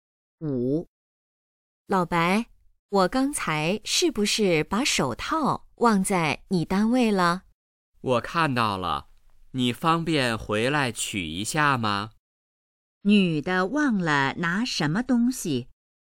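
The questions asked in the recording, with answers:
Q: 女的忘了拿什么东西?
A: 手套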